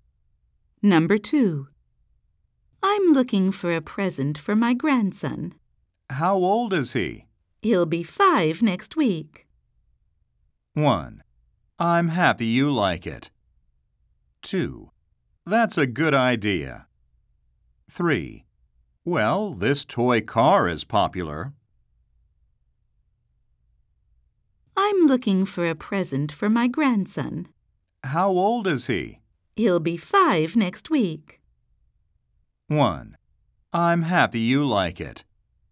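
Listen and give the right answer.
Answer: 3: Well, this toy car is popular.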